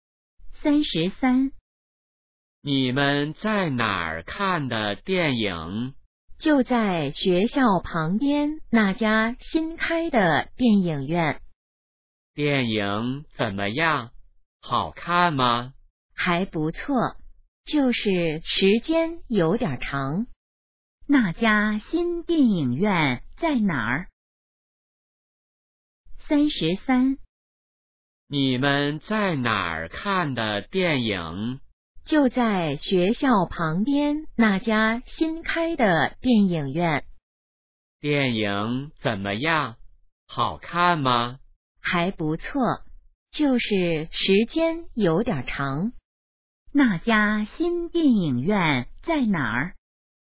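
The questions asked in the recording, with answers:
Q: 那家新电影院在哪儿?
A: 学校旁边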